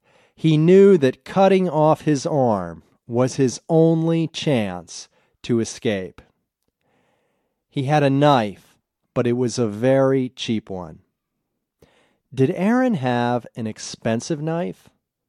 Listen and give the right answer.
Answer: No, his knife wasn't expensive.